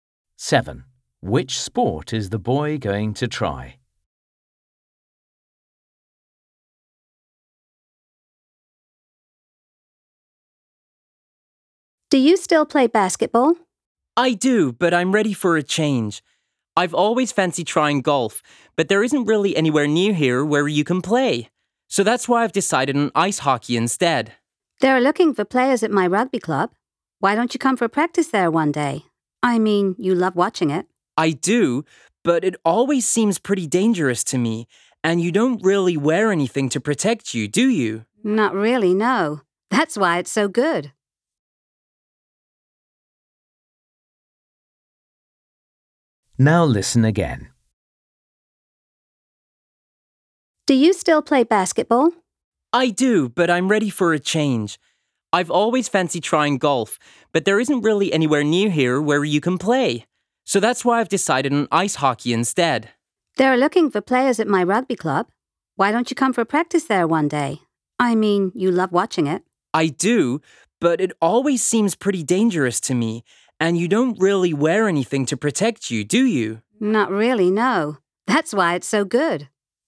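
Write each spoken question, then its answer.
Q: Which sport is the boy going to try?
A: ice hockey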